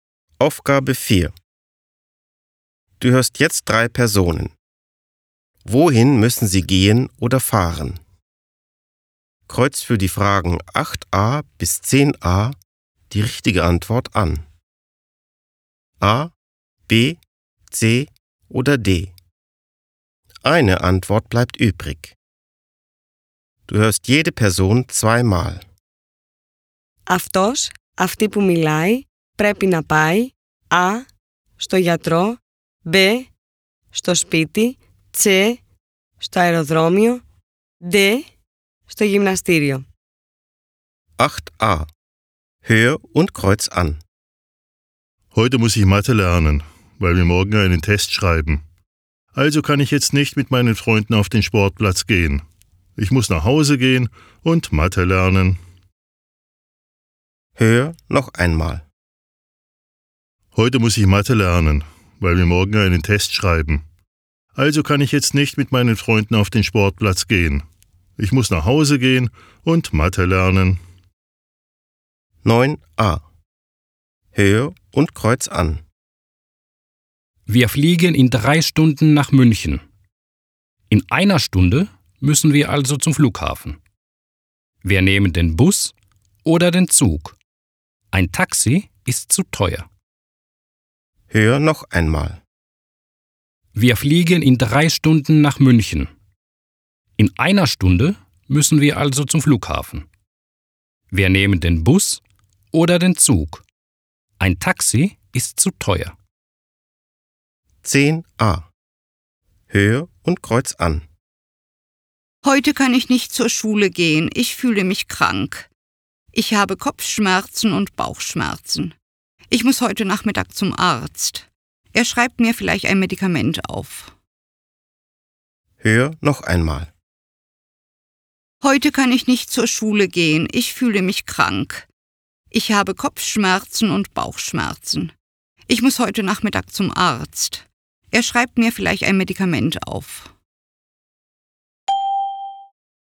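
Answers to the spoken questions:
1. B: στο σπίτι
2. C: στο αεροδρόμιο
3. A: στο γιατρό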